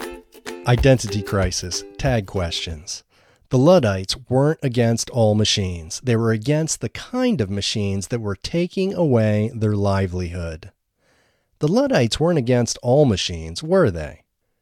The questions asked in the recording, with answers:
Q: The Luddites weren't against all machines, were they?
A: No, the Luddites weren't against all machines.